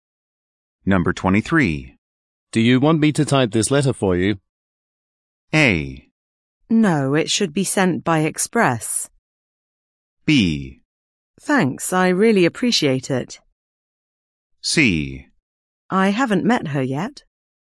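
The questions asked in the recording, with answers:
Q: Do you want me to type this letter for you?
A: B: Thanks, I really appreciate it.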